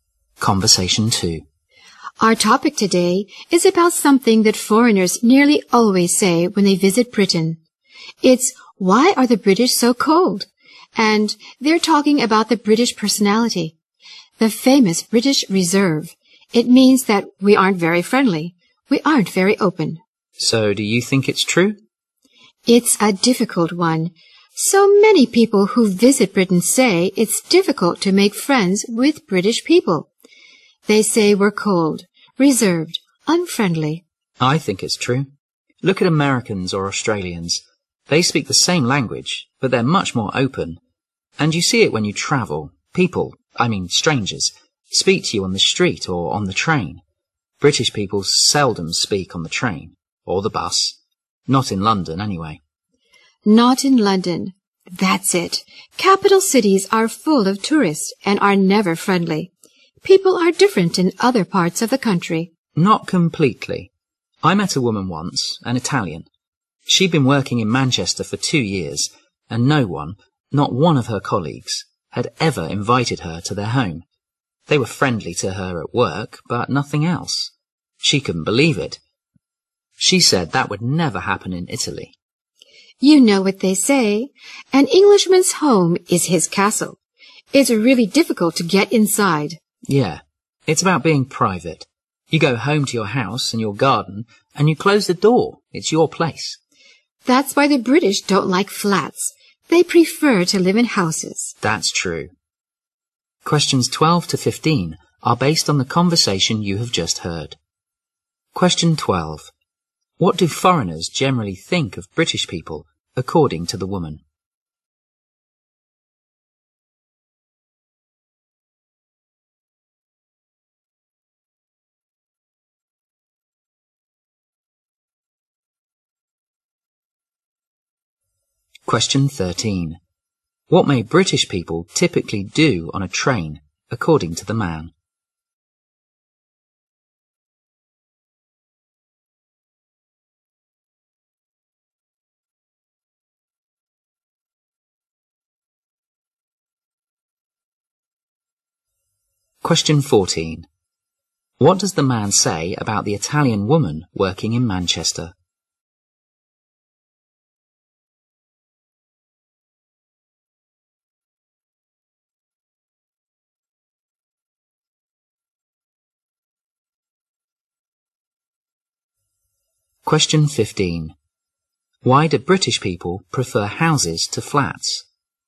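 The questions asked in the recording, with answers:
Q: What do foreigners generally think of British people, according to the woman?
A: They are cold, reserved and unfriendly

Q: What may British people typically do on a train, according to the man?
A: Seldom speak to others

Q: What does the man say about the Italian woman working in Manchester?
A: None of her colleagues invited her to their home in 2 years

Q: Why do British people prefer houses to flats?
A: They value privacy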